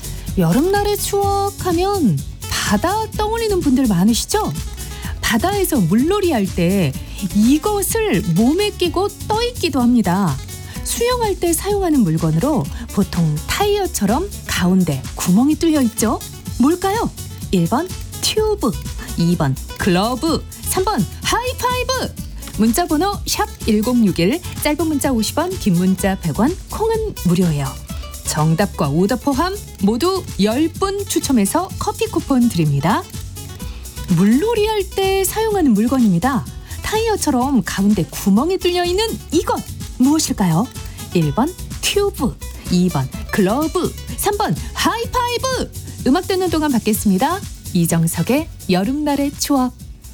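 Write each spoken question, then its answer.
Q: 물놀이 할 때 사용하는 물건입니다. 타이어처럼 가운데 구멍이 뚫려 있는 이것 무엇일까요?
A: 1: 튜브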